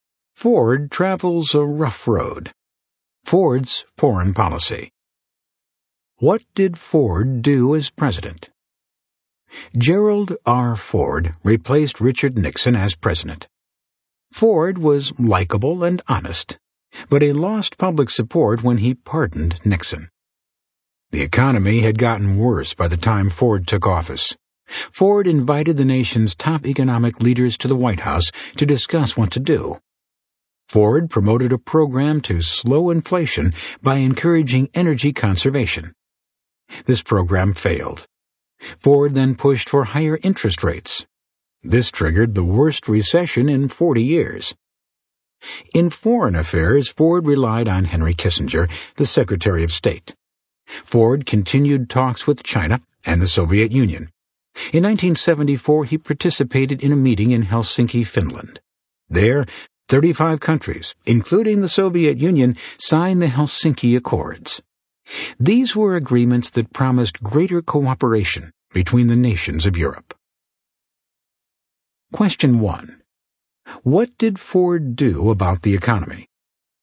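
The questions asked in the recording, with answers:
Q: What did Ford do about the economy?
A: He promoted energy conservation to slow inflation, then pushed for higher interest rates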